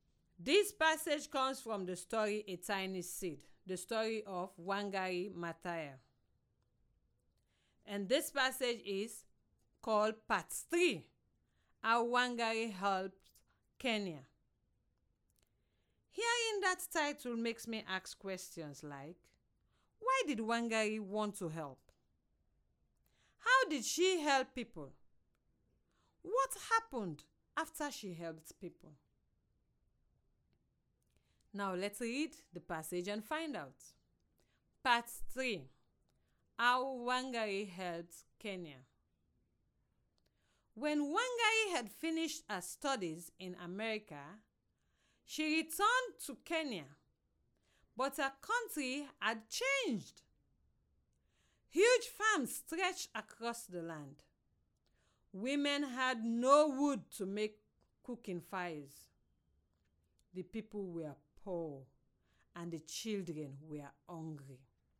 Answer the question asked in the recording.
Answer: She loved her people so she didn't want to see them suffer.